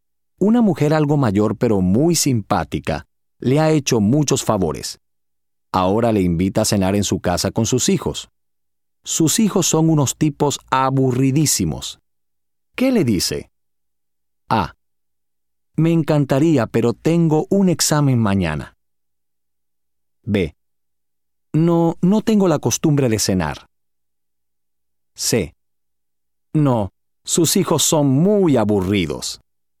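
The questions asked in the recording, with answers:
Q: ¿Qué le dice?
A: A: Me encantaría, pero tengo un examen mañana.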